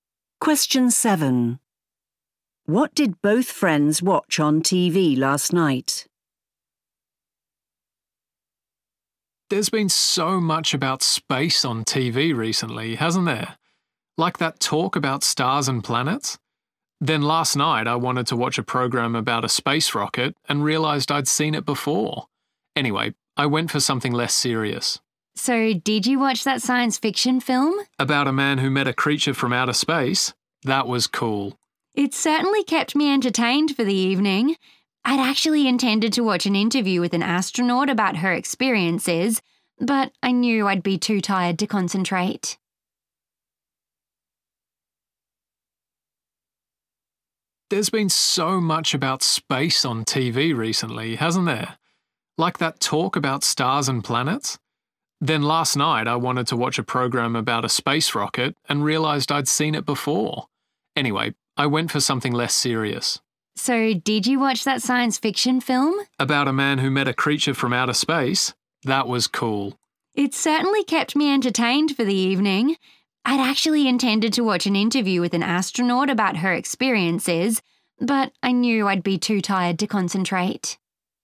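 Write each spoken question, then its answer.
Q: What did both friends watch on TV last night?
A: a science fiction film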